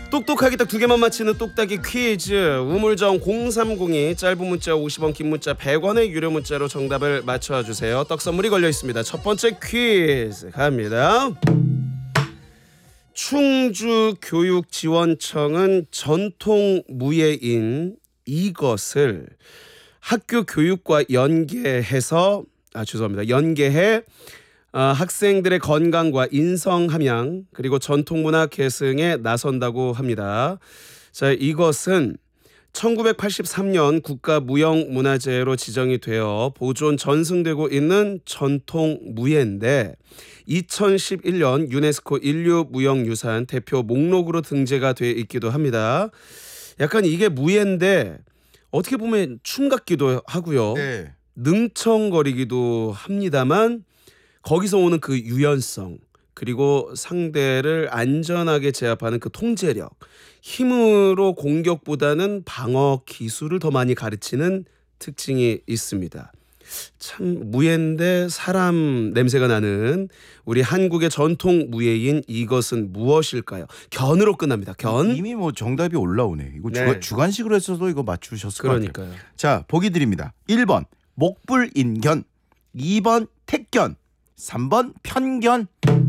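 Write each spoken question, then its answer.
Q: 참 무예인데 사람 냄새가 나는 우리 한국의 전통 무예인 이것은 무엇일까요?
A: 2번: 택견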